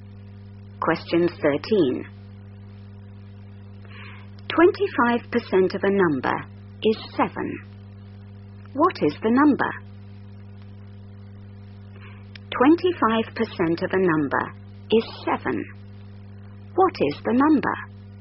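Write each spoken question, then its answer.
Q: 25% of a number is 7. What is the number?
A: 28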